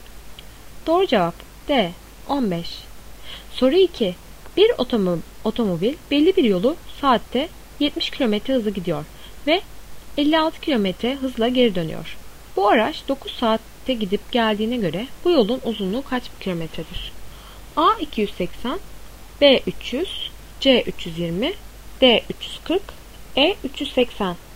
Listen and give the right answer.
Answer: Doğru cevap A 280.